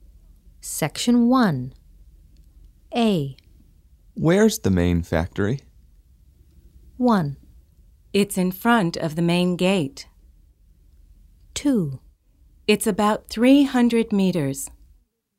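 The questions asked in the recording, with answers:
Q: Where's the main factory?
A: 1: It's in front of the main gate.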